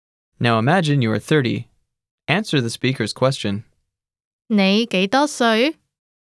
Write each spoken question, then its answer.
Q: 你幾多歲?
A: 我30歲.